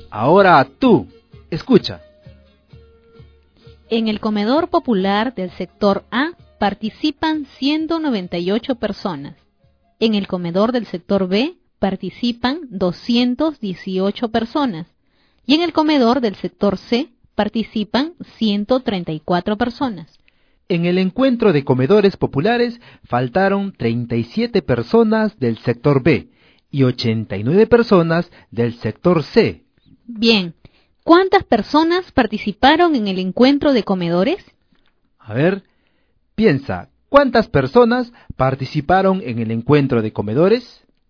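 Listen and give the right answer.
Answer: 424 personas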